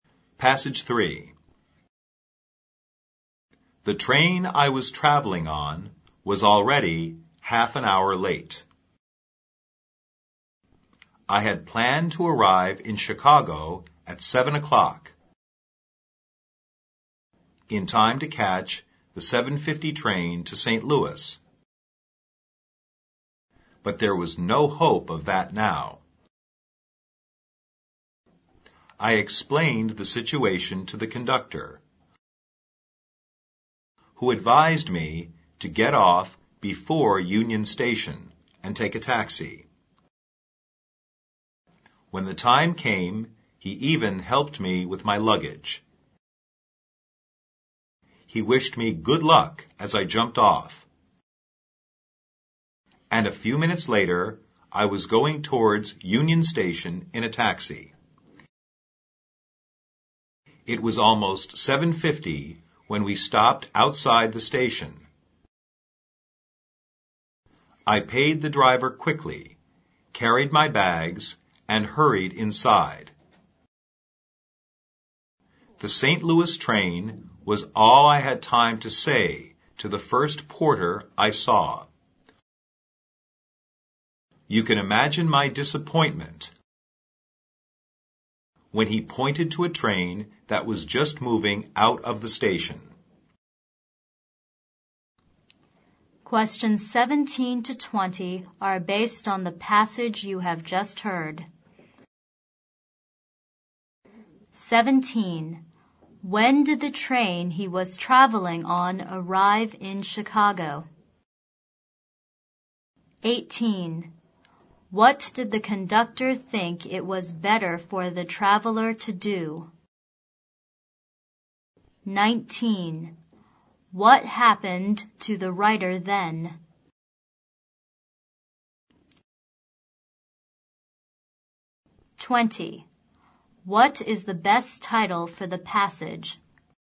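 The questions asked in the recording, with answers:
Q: When did the train he was traveling on arrive in Chicago?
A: Half an hour late, at about 7:30

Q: What did the conductor think it was better for the traveler to do?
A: Get off before Union Station and take a taxi

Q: What happened to the writer then?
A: He missed the St. Louis train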